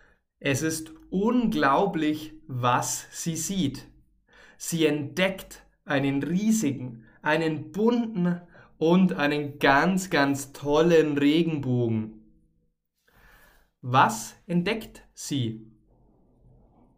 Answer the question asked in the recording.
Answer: Sie entdeckt einen riesigen, das heißt einen großen, einen bunten, bunt heißt viele Farben, und einen tollen, einen schönen Regenbogen.